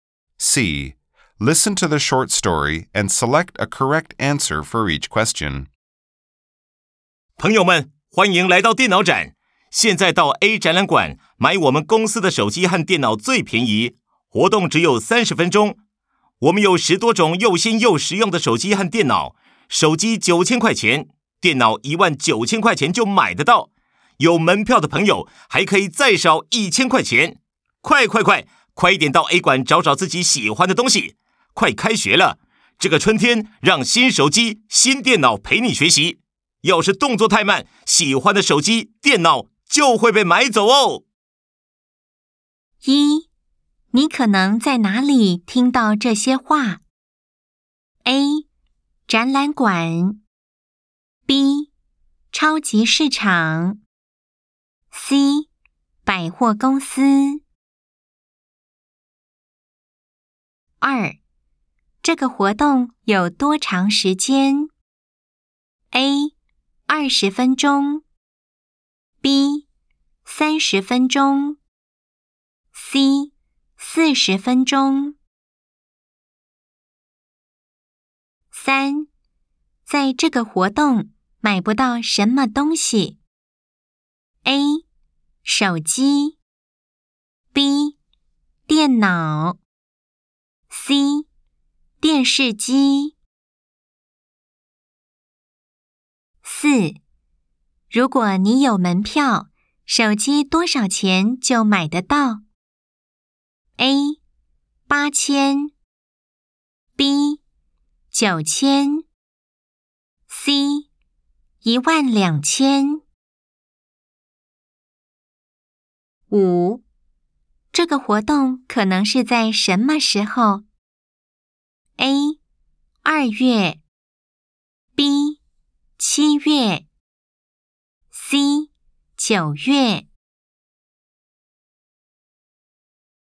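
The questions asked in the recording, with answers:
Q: 你可能在哪里听到这些话 ?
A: A: 展览馆

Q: 这个活动有多长时间 ?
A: B: 30分钟

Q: 在这个活动买不到什么东西 ?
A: C: 电视机

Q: 如果你有门票,手机多少钱就买得到 ?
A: A: 8000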